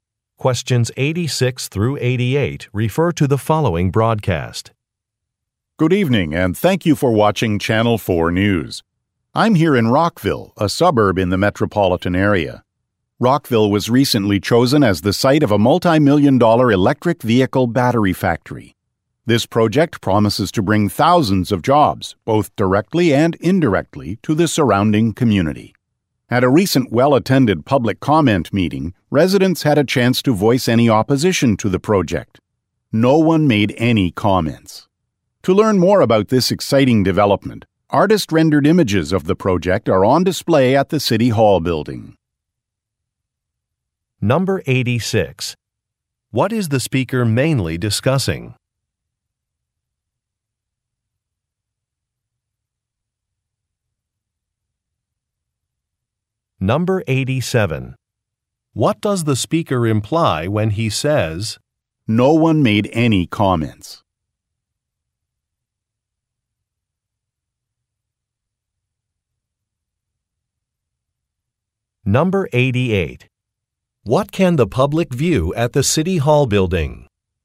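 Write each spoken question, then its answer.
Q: What is the speaker mainly discussing?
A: A new electric vehicle battery factory in Rockville

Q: What does the speaker imply when he says, "No one made any comments"?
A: Residents have no opposition to the project

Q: What can the public view at the City Hall building?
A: Artist-rendered images of the project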